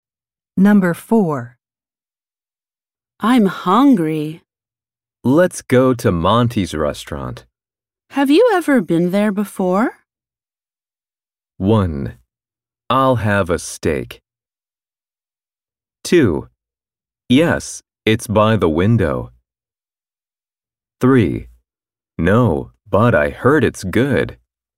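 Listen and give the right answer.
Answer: 3: No, but I heard it's good.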